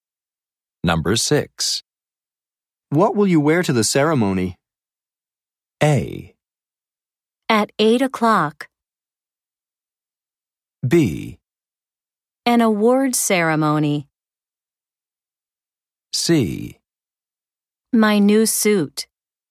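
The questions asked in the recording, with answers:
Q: What will you wear to the ceremony?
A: C: My new suit.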